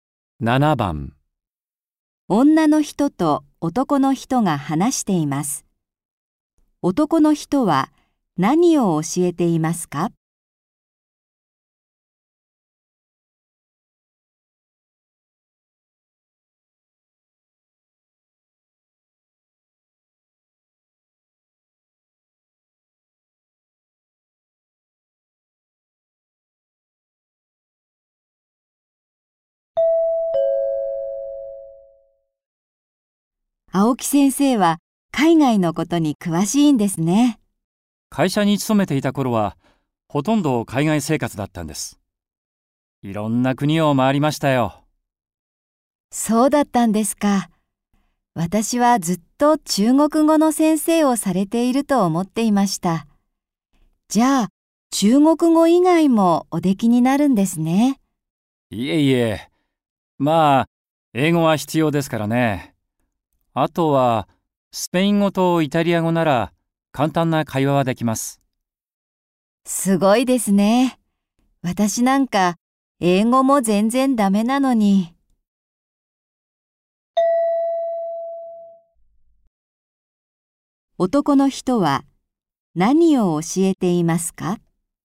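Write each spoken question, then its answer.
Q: 男の人は、何を教えていますか?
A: 中国語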